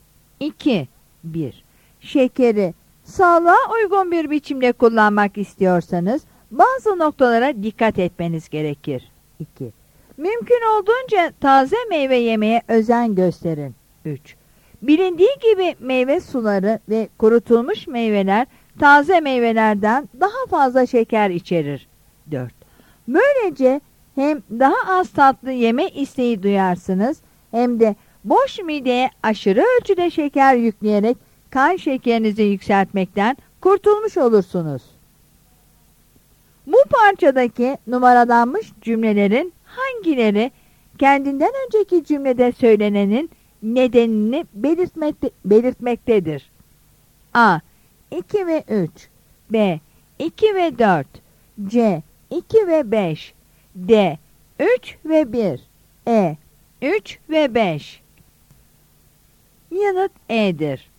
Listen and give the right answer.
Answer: Yanıt E'dir.